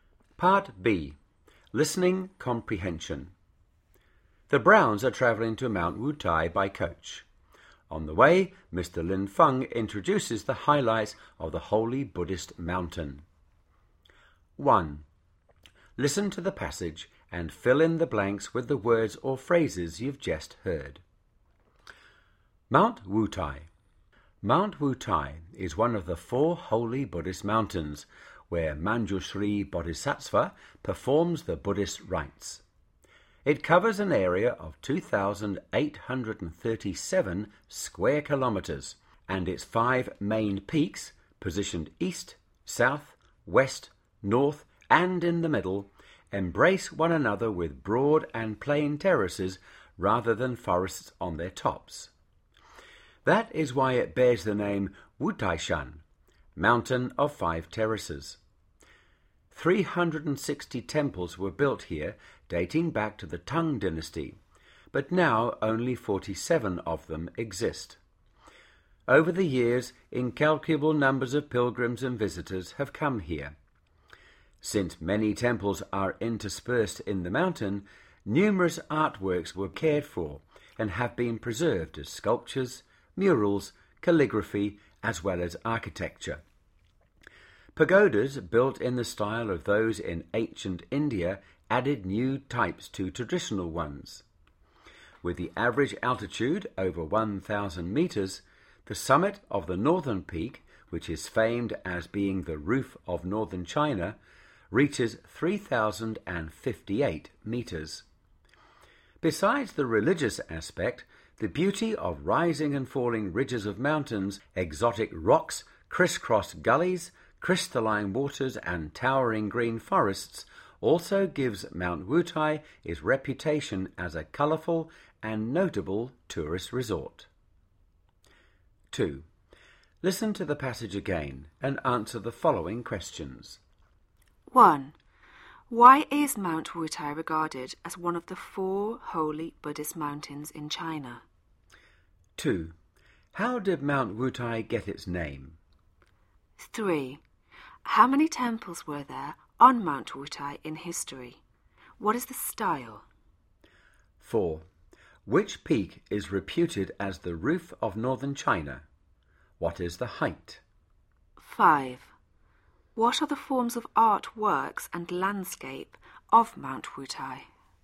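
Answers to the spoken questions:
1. It is where Manjushri Bodhisattva performs the Buddhist rites
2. Its five main peaks have broad, flat terraces on top instead of forests, so it is called the Mountain of Five Terraces
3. 360
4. The northern peak
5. 3,058 meters
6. Artworks: sculptures, murals, calligraphy and architecture. Landscape: rising and falling ridges, exotic rocks, crisscross gullies, crystal-clear waters and towering green forests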